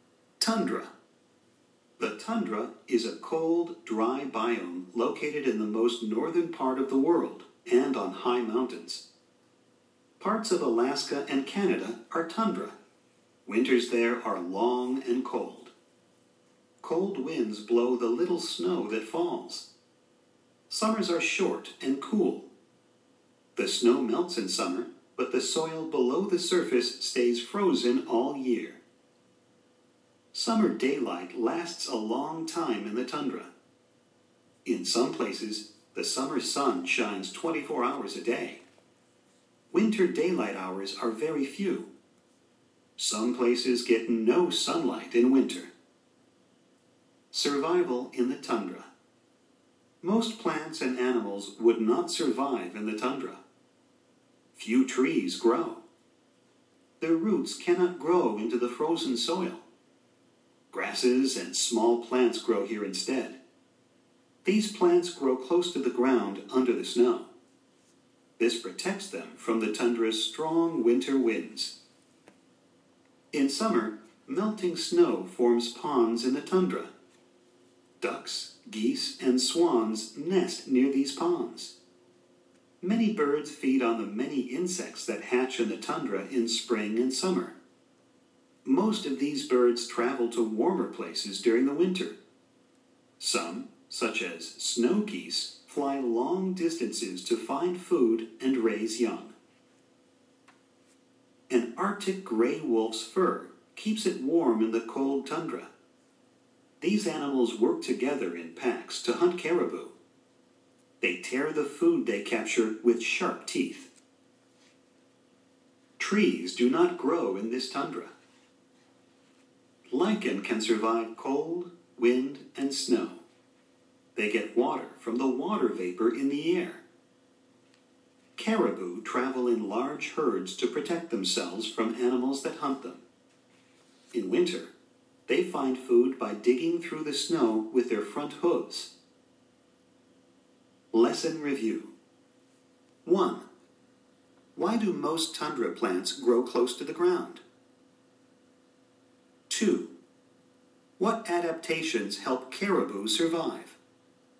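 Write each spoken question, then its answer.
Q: Why do most tundra plants grow close to the ground?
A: To be protected under the snow from the strong winter winds

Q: What adaptations help caribou survive?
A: They travel in large herds for protection and dig through snow with their front hooves to find food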